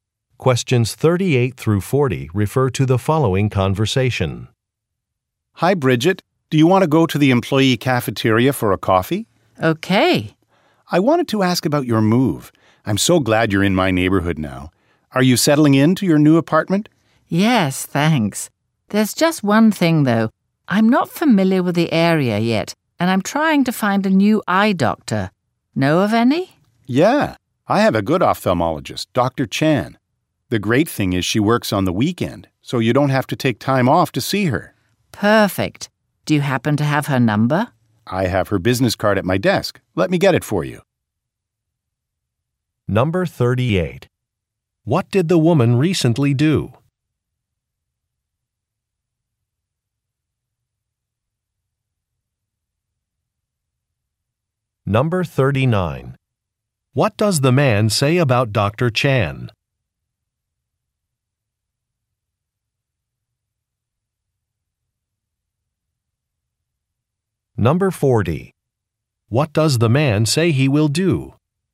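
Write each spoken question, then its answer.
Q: What did the woman recently do?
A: Moved to a new apartment

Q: What does the man say about Dr.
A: She works on the weekend

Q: What does the man say he will do?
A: Get the doctor's business card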